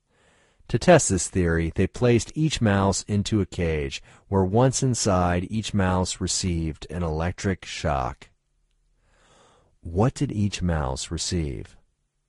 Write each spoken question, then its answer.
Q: What did each mouse receive?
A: Each mouse received an electric shock.